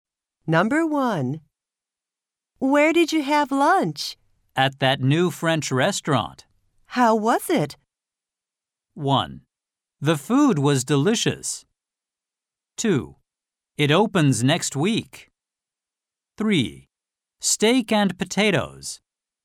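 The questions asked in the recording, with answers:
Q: How was it?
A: 1: The food was delicious.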